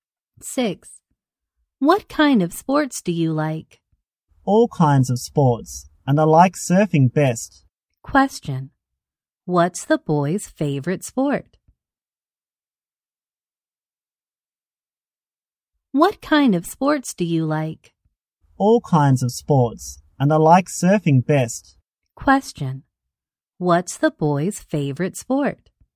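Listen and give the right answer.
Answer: Surfing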